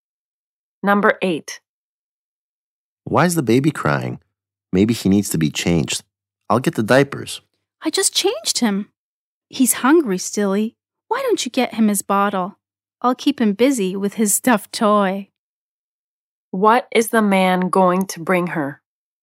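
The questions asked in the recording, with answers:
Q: What is the man going to bring her?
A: The baby's bottle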